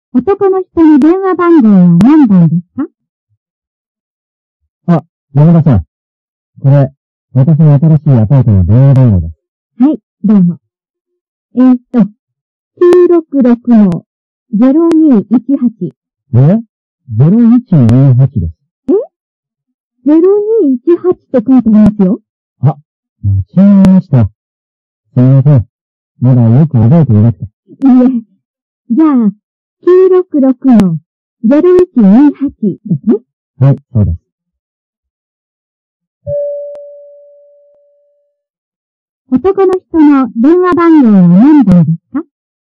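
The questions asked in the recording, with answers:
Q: 男の人の電話番号は何番ですか?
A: 966-0128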